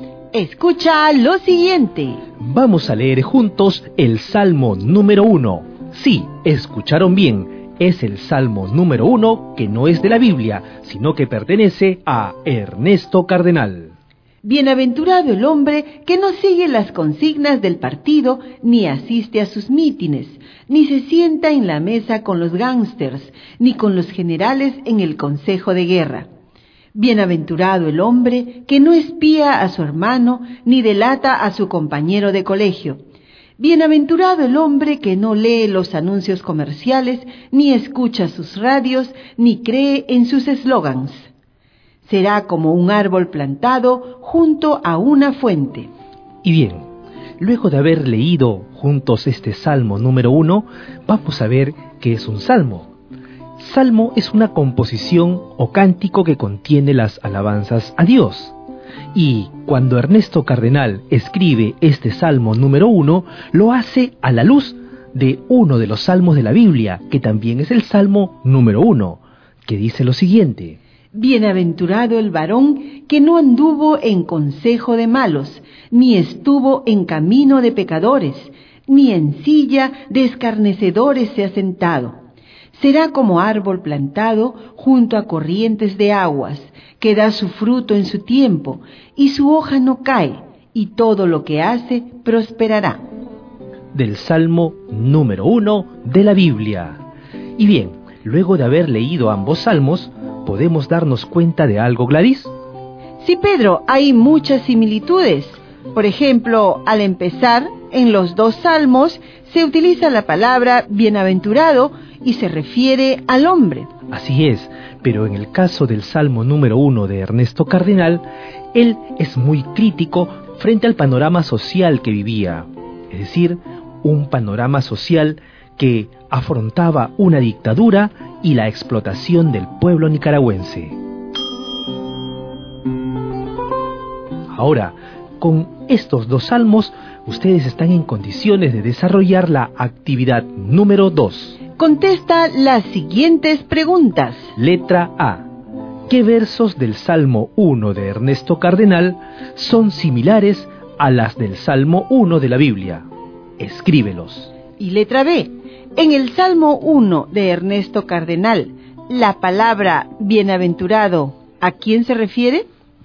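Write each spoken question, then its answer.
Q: En el Salmo 1 de Ernesto Cardenal, la palabra bienaventurado, ¿a quién se refiere?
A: Al hombre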